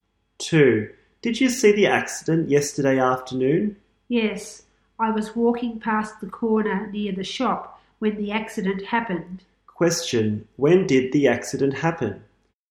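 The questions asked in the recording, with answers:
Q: When did the accident happen?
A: Yesterday afternoon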